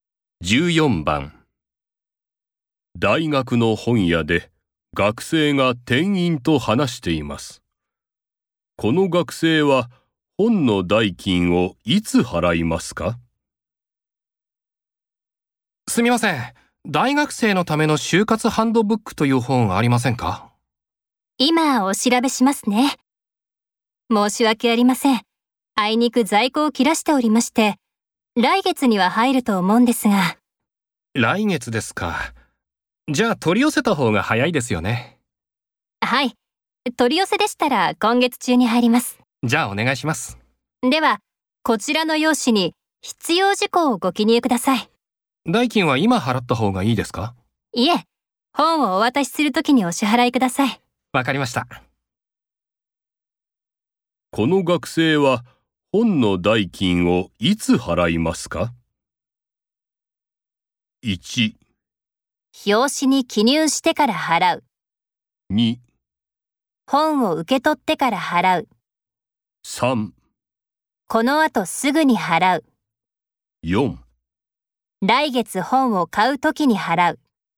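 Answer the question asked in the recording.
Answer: 2: 本を受け取ってから払う。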